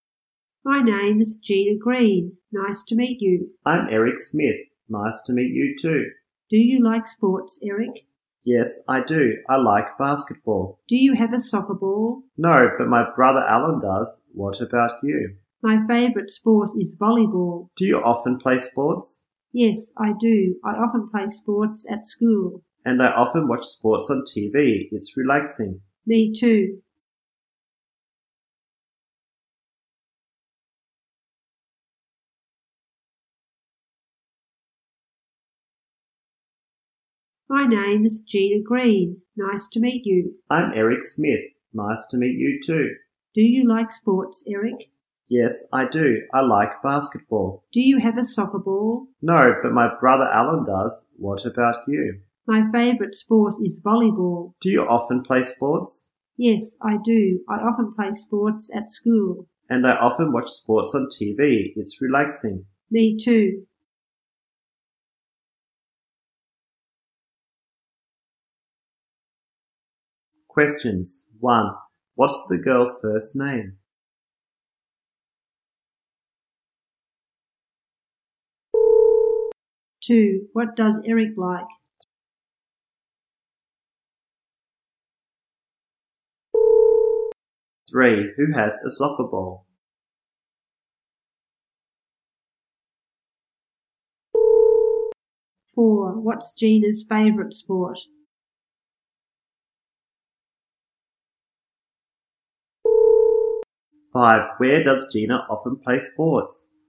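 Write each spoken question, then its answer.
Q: What's the girl's first name?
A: Gina

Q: What does Eric like?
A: Basketball

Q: Who has a soccer ball?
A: Eric's brother Alan

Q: What's Gina's favorite sport?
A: Volleyball

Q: Where does Gina often play sports?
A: At school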